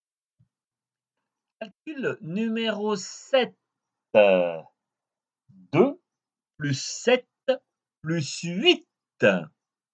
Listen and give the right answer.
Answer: Dix-sept.